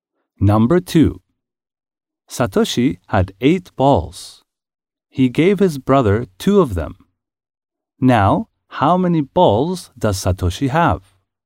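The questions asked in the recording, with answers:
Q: Now, how many balls does Satoshi have?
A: Six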